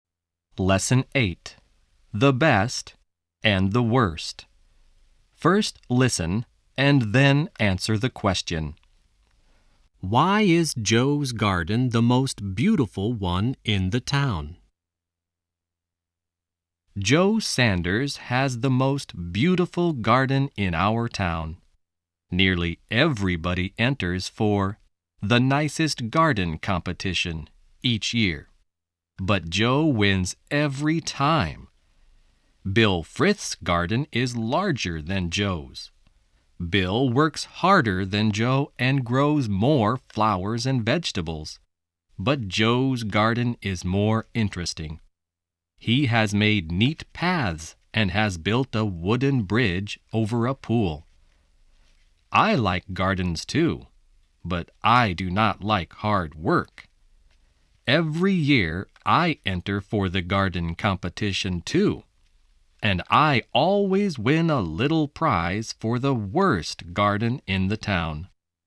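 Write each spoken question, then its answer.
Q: Why is Joe's garden the most beautiful one in the town?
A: Because it is more interesting: he has made neat paths and built a wooden bridge over a pool.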